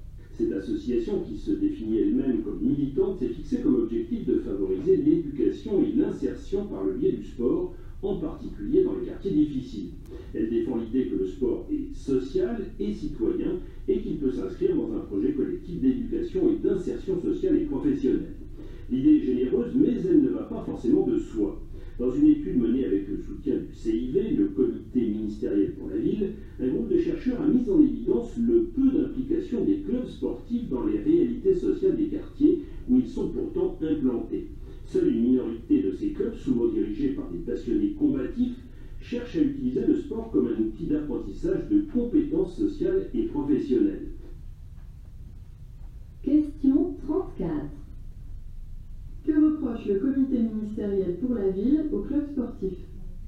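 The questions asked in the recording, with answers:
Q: Que reproche le comité ministériel pour la ville aux clubs sportifs ?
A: Ils s'impliquent peu dans les réalités sociales des quartiers où ils sont implantés.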